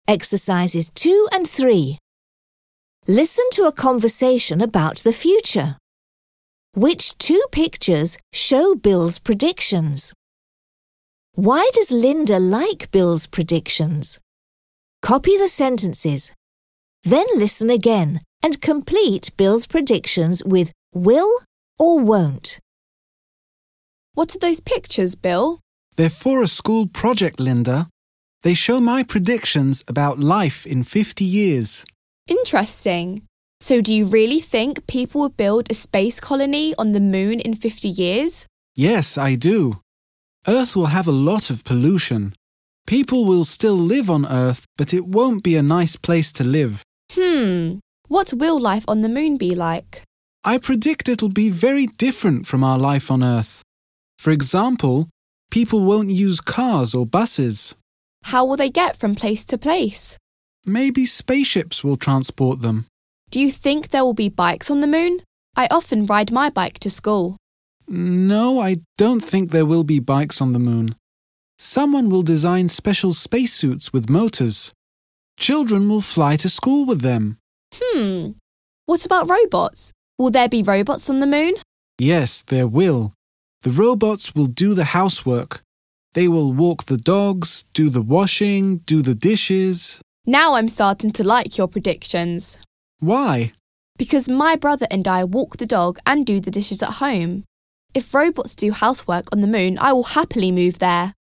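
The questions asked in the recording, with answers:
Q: Why does Linda like Bill's predictions?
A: Because robots will do the housework, like walking the dog and doing the dishes, which she and her brother do at home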